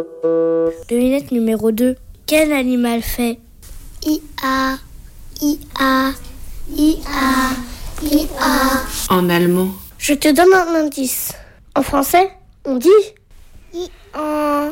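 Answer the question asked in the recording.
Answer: l'âne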